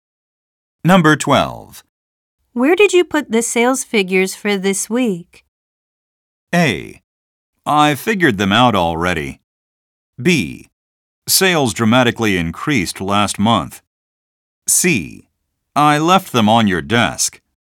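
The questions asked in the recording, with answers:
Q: Where did you put the sales figures for this week?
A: C: I left them on your desk.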